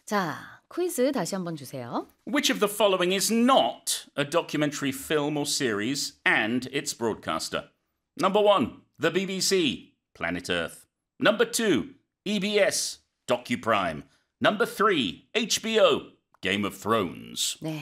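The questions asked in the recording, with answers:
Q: Which of the following is not a documentary film or series and its broadcaster?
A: 3: HBO, Game of Thrones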